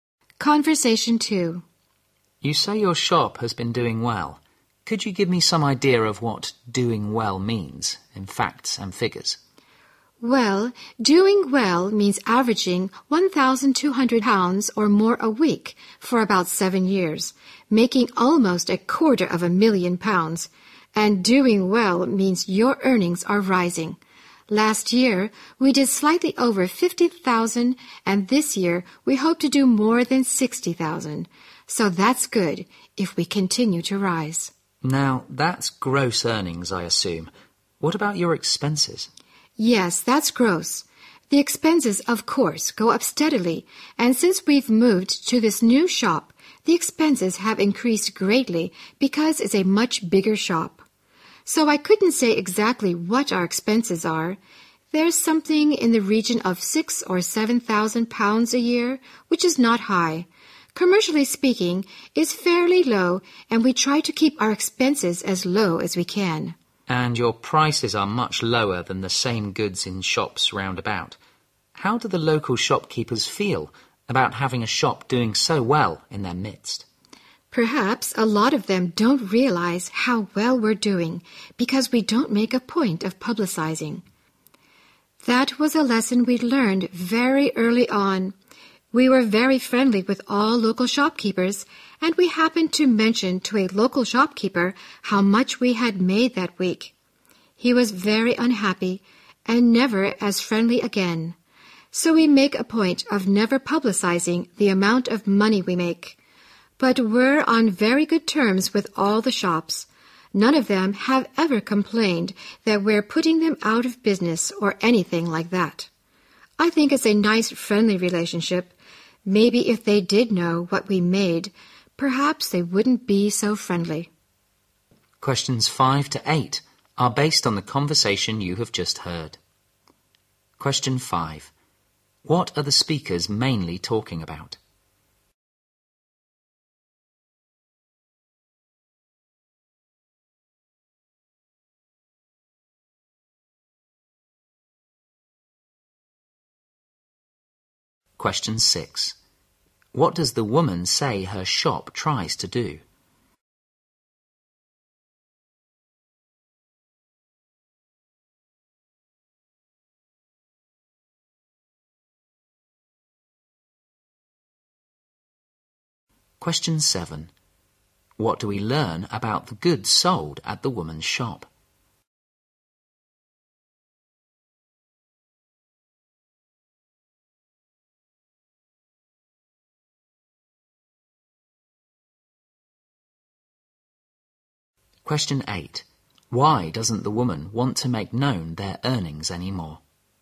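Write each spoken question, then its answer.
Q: What are the speakers mainly talking about?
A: How well the woman's shop is doing.

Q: What does the woman say her shop tries to do?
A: Keep its expenses as low as possible.

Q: What do we learn about the goods sold at the woman's shop?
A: They are much cheaper than in nearby shops.

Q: Why doesn't the woman want to make known their earnings anymore?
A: A local shopkeeper became unfriendly after she told him.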